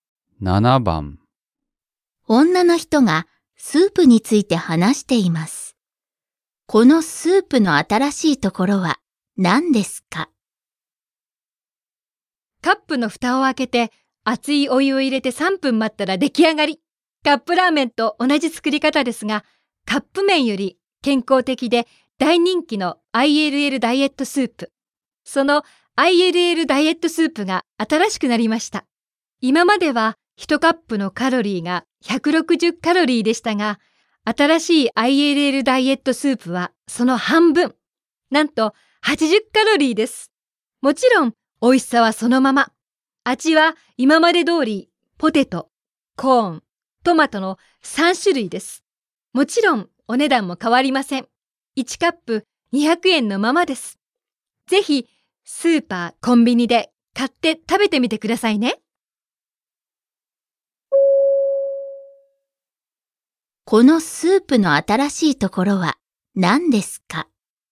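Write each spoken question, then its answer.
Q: このスープの新しいところは何ですか?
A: カロリーが半分の80カロリーになった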